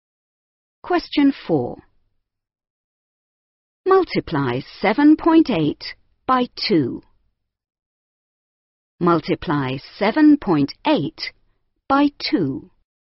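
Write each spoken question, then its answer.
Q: Multiply 7.8 by 2.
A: 15.6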